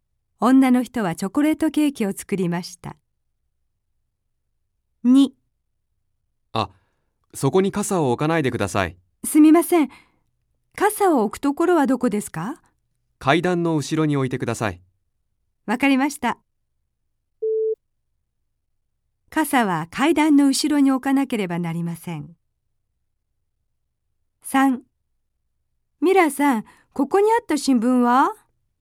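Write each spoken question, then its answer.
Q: 傘は階段の後ろに置かなければなりません。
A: ○(正しい)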